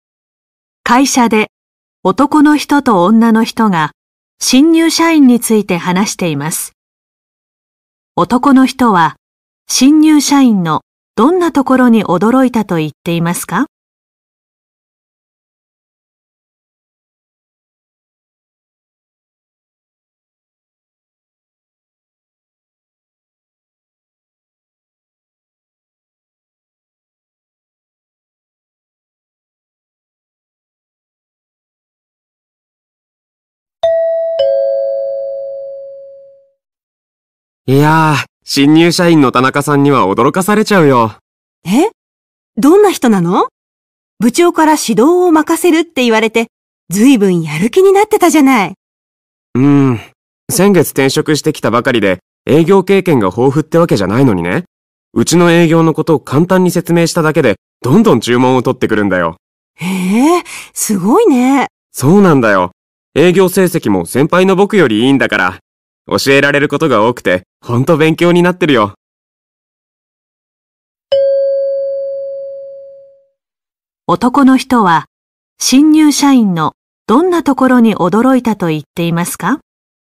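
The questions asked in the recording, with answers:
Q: 男の人は、新入社員のどんなところに驚いたと言っていますか?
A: 営業経験が豊富ではないのに、簡単に説明しただけでどんどん注文を取ってくるところ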